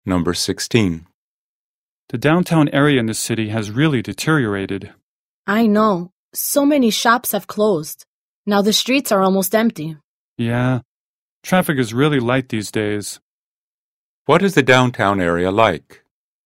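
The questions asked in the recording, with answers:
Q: What is the downtown area like?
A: Run-down and quiet: many shops have closed and the streets are almost empty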